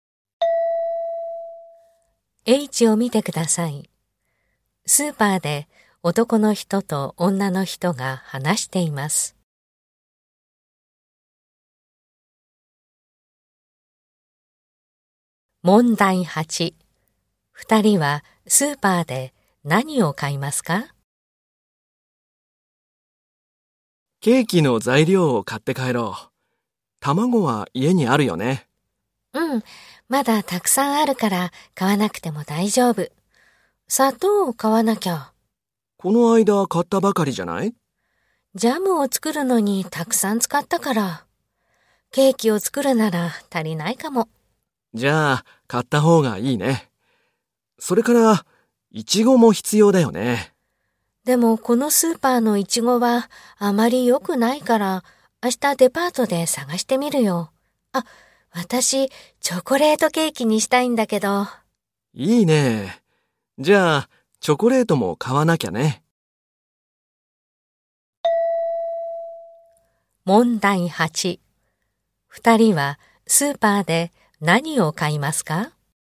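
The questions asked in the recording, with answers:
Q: 二人はスーパーで何を買いますか?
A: 砂糖とチョコレート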